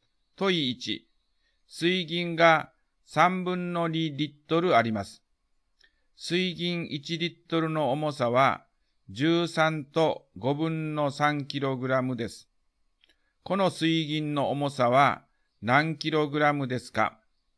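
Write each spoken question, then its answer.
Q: この水銀の重さは何キログラムですか?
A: 9と15分の1キログラム(15分の136キログラム)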